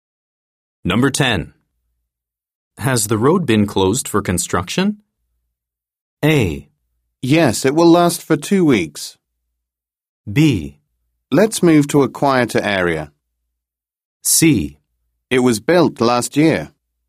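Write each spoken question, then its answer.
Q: Has the road been closed for construction?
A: A: Yes, it will last for 2 weeks.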